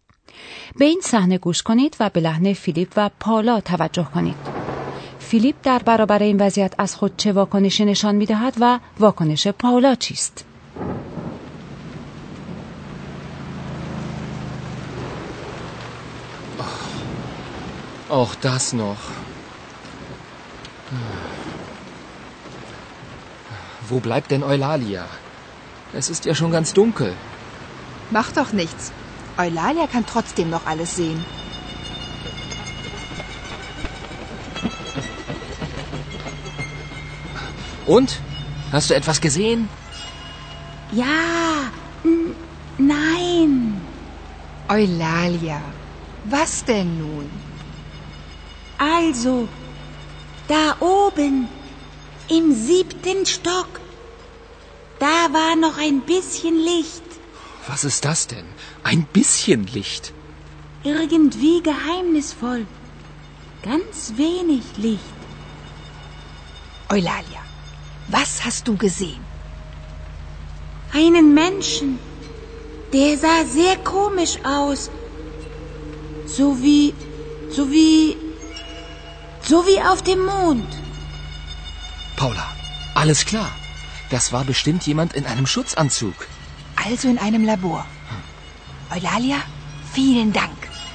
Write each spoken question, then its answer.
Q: فیلیپ در برابر این وضعیت از خود چه واکنشی نشان دهد و واکنش پالا چیست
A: فیلیپ واکنشی عصبی است. پاولا آرامتر است.